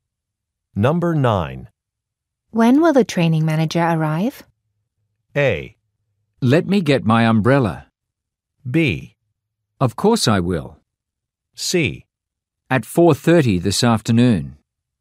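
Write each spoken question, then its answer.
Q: When will the training manager arrive?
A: C: At 4:30 this afternoon.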